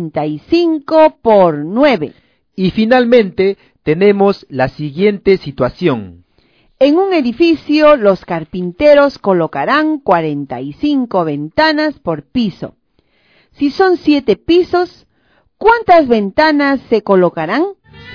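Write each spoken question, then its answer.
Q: Si son 7 pisos, ¿cuántas ventanas se colocarán?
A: 315 ventanas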